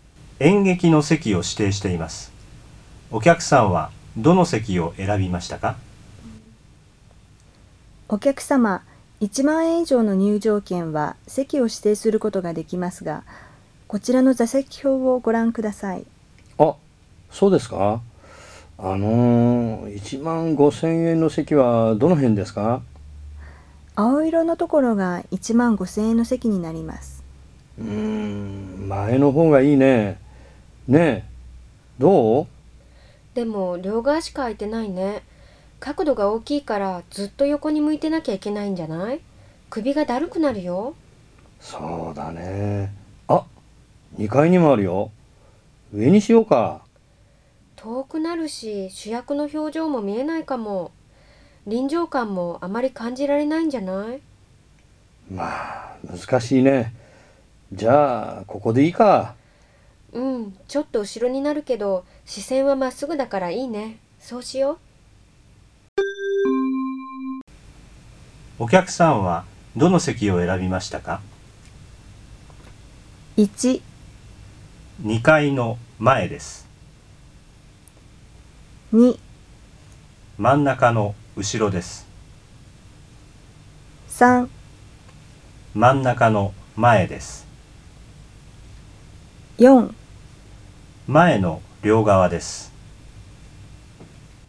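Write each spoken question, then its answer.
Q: お客さんはどの席を選びましたか?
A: 2: 真ん中の後ろです。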